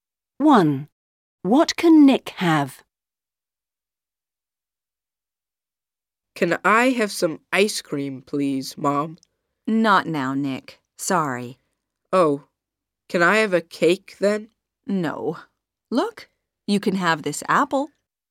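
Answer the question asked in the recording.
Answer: an apple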